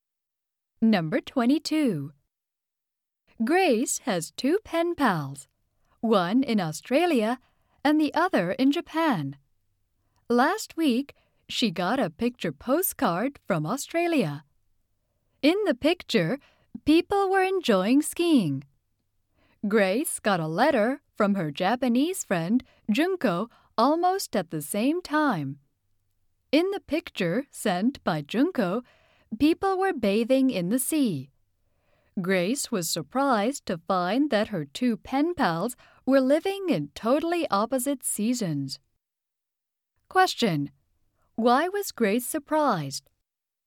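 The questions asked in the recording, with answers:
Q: Why was Grace surprised?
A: Her two pen pals were living in opposite seasons.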